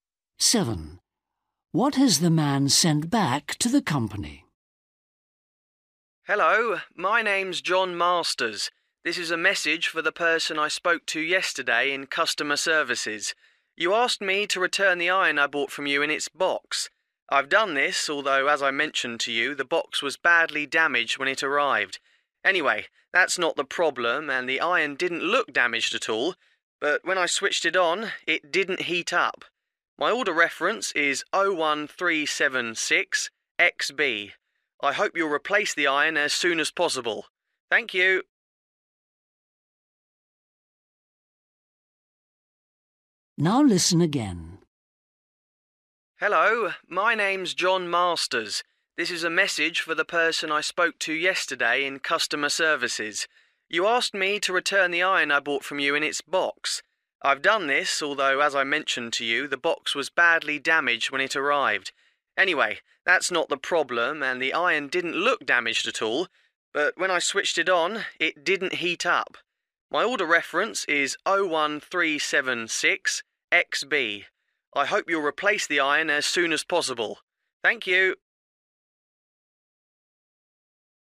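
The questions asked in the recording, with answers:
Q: What has the man sent back to the company?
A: the iron in its box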